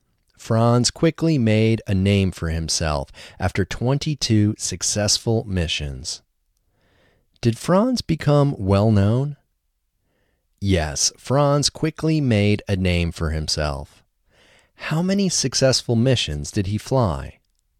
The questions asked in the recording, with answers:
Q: How many successful missions did he fly?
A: He flew 22 successful missions.